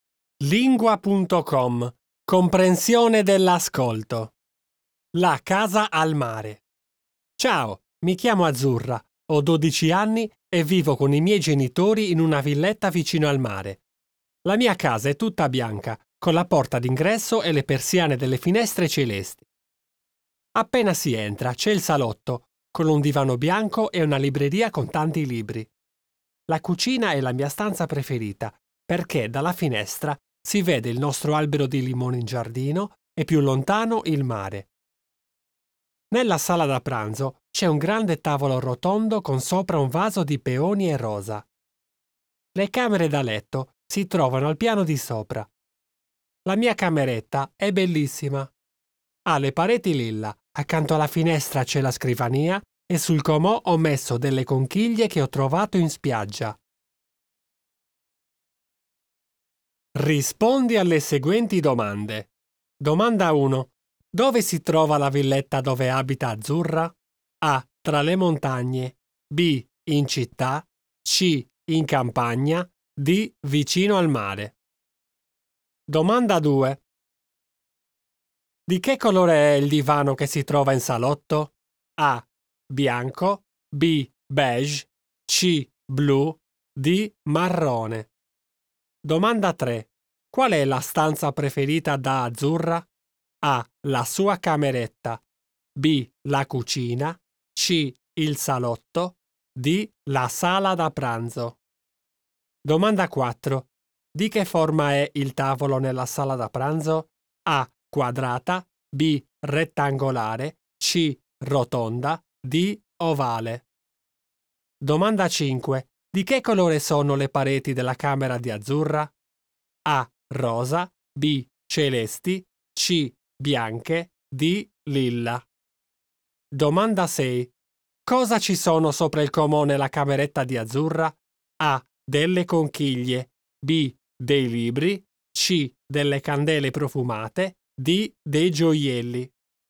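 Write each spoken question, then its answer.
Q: Dove si trova la villetta dove abita Azzurra?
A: D: Vicino al mare.

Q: Di che colore è il divano che si trova in salotto?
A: A: Bianco.

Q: Qual è la stanza preferita da Azzurra?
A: B: La cucina.

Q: Di che forma è il tavolo nella sala da pranzo?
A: C: Rotonda.

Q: Di che colore sono le pareti della camera di Azzurra?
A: D: Lilla.

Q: Cosa ci sono sopra il comò nella cameretta di Azzurra?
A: A: Delle conchiglie.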